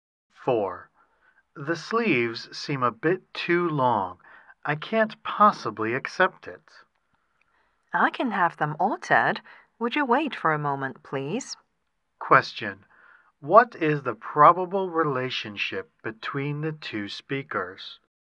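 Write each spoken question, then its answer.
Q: What is the probable relationship between the two speakers?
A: Customer and shop assistant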